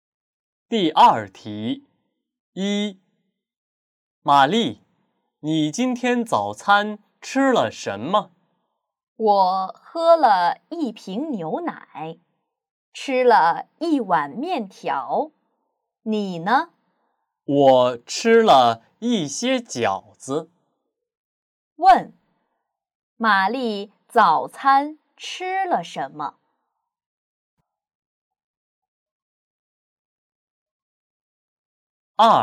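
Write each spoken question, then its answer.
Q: 问,玛丽早餐吃了什么?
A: 一瓶牛奶和一碗面条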